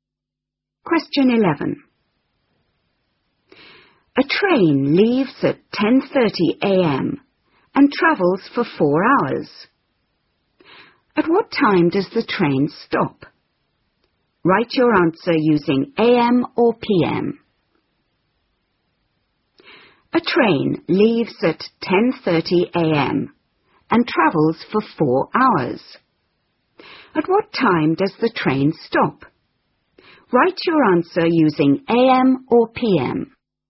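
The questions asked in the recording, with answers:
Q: At what time does the train stop?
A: 2:30 p.m.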